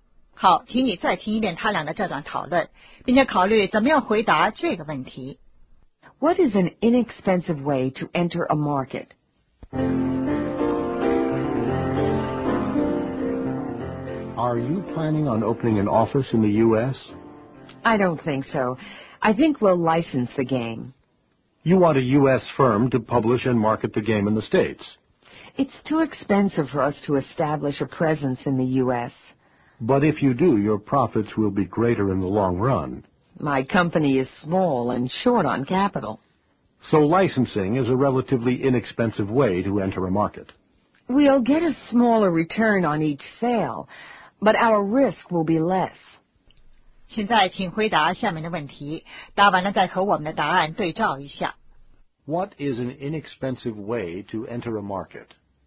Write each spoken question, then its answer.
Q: What is an inexpensive way to enter a market?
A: Licensing the game.